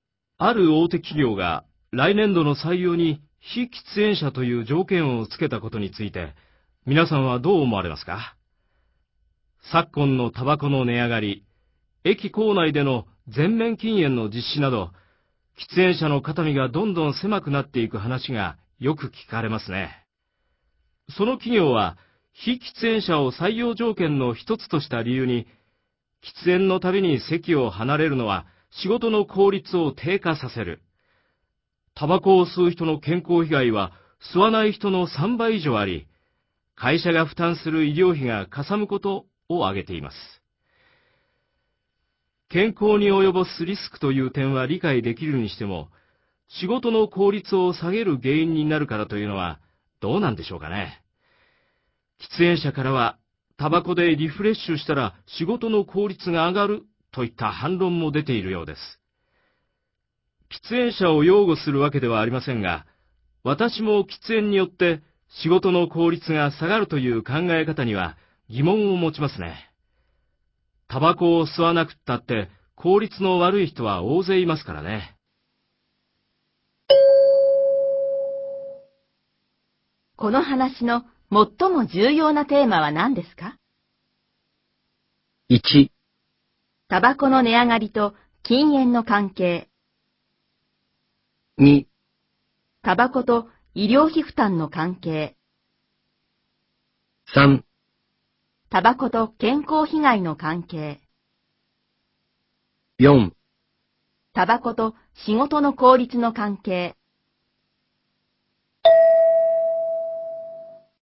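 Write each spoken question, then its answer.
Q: この話の最も重要なテーマは何ですか?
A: 4: タバコと仕事の効率の関係。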